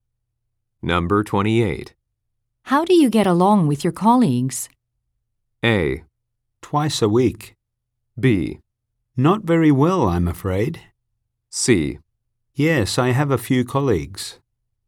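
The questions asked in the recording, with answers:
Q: How do you get along with your colleagues?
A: B: Not very well, I'm afraid.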